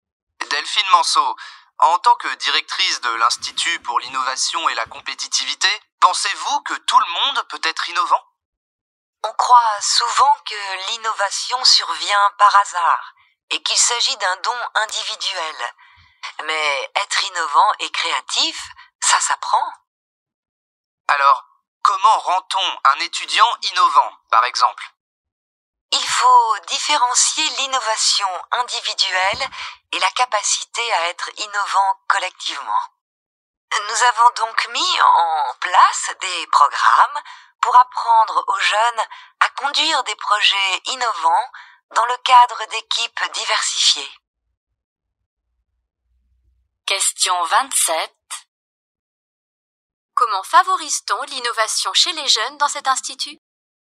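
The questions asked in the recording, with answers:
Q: Comment favorise-t-on l'innovation chez les jeunes dans cet institut ?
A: Grâce à des programmes qui leur apprennent à conduire des projets innovants dans des équipes diversifiées.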